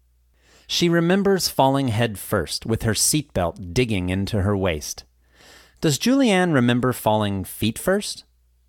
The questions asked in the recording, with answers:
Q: Does Julianne remember falling feet first?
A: No, she remembers falling head first.